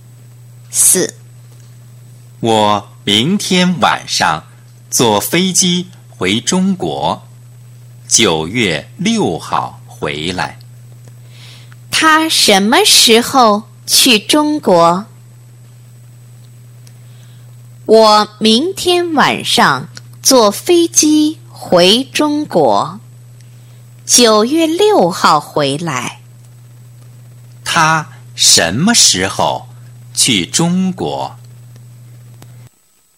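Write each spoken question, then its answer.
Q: 他什么时候去中国?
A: 明天晚上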